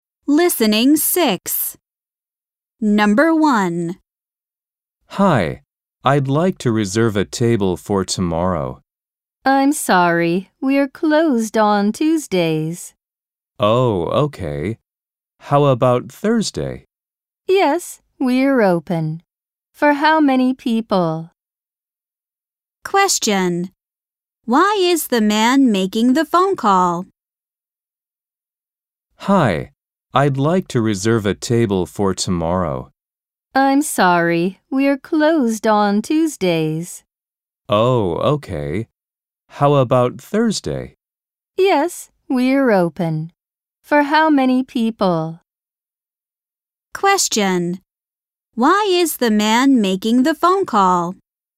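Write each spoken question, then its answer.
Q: Why is the man making the phone call?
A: To reserve a table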